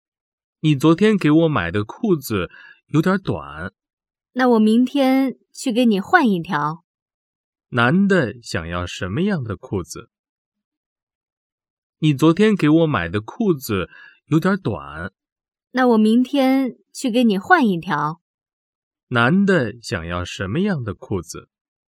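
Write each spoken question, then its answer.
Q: 男的想要什么样的裤子?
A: 长一点的裤子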